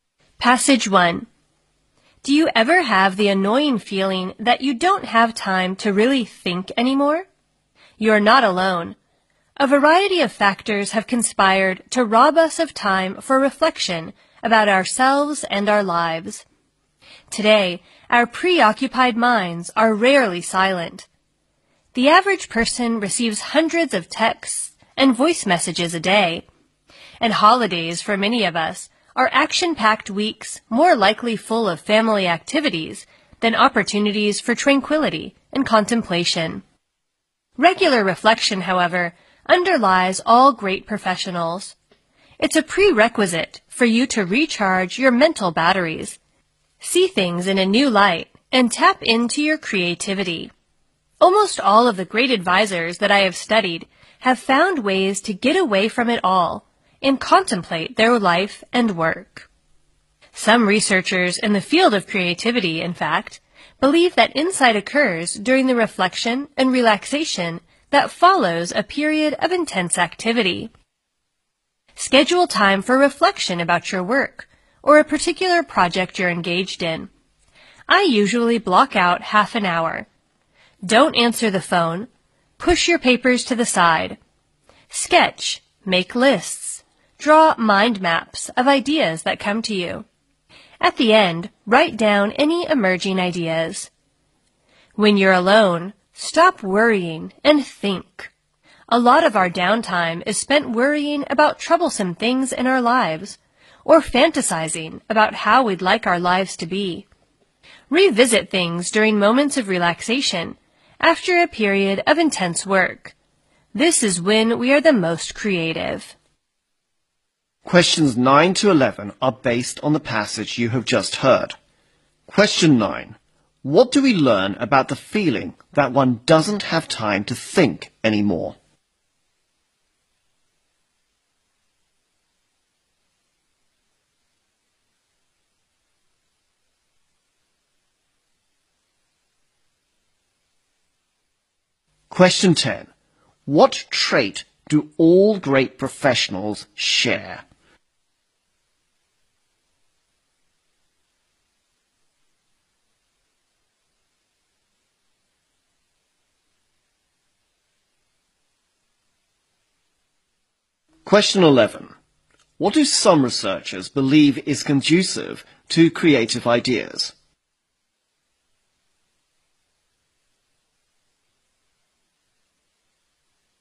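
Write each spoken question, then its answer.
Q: What do we learn about the feeling that one doesn't have time to think anymore?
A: It is common; you're not alone.

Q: What trait do all great professionals share?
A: Regular reflection.

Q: What do some researchers believe is conducive to creative ideas?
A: Reflection and relaxation after a period of intense activity.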